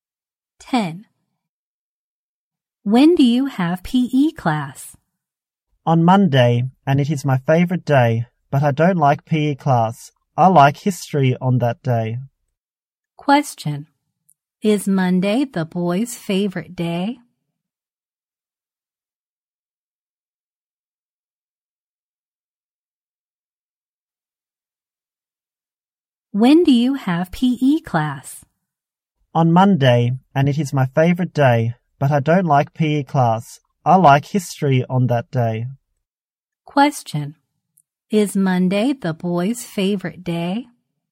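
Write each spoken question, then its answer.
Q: Question. Is Monday the boy's favorite day?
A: Yes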